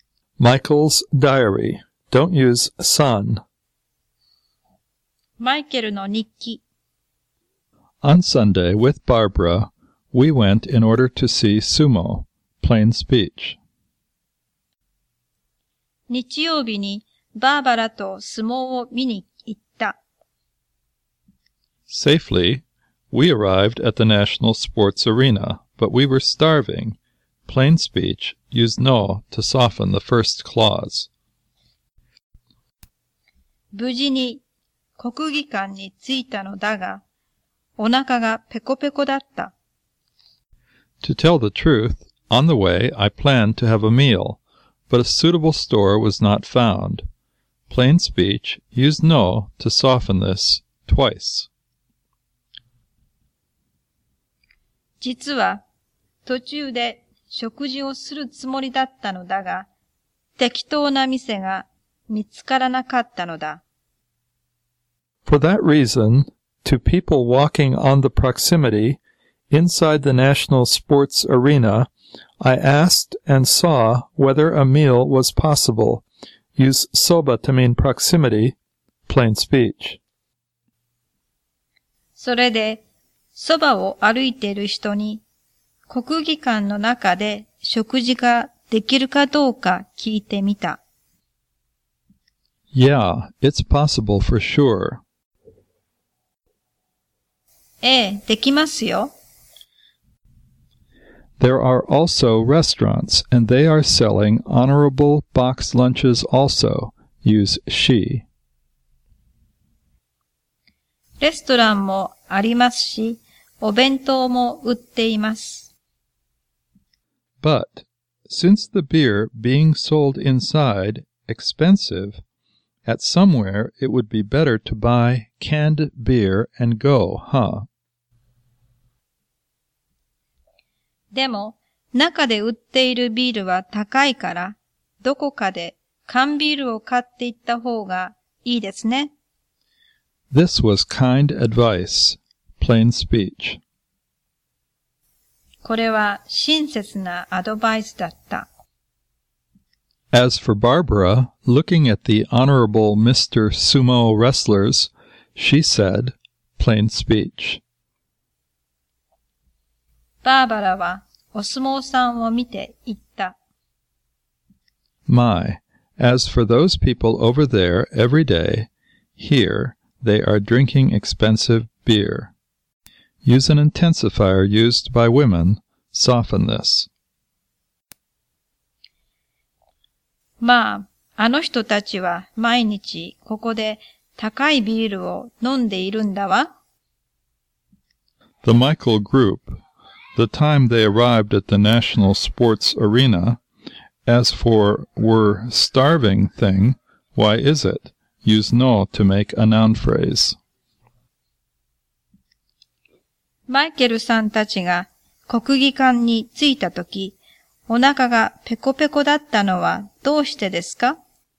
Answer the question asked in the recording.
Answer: 途中で食事をして来なかったからです。